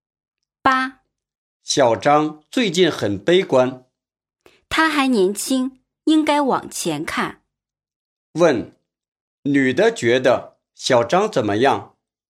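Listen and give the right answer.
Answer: 他还年轻,不应该悲观,应该往前看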